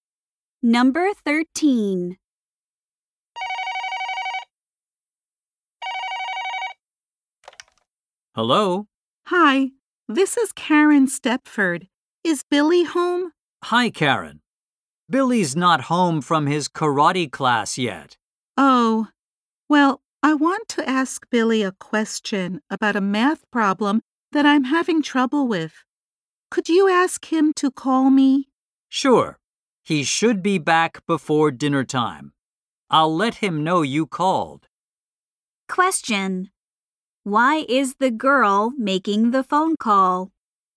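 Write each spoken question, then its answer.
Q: Why is the girl making the phone call?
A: To ask Billy a question about a math problem.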